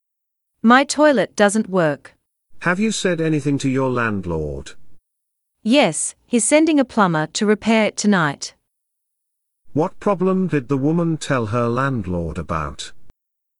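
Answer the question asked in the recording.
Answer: Her toilet doesn't work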